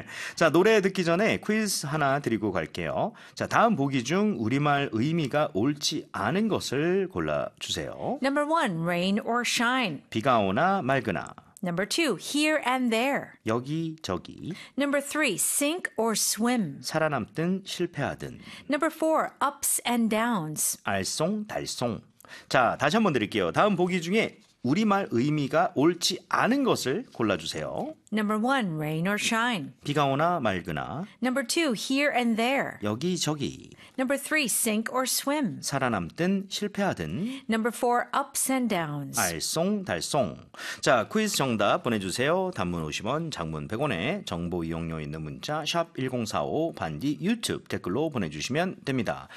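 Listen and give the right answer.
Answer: 4: ups and downs - 알쏭달쏭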